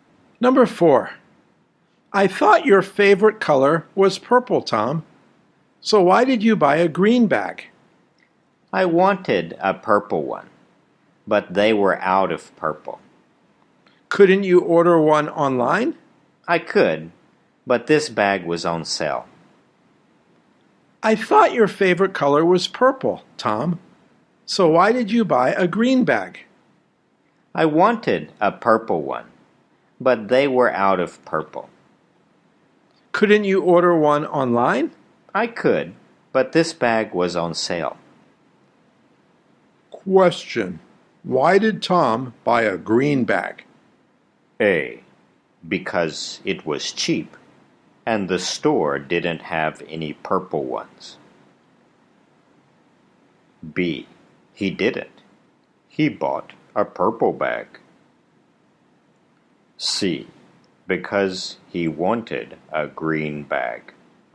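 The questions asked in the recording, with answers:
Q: Why did Tom buy a green bag?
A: A: Because it was cheap, and the store didn't have any purple ones.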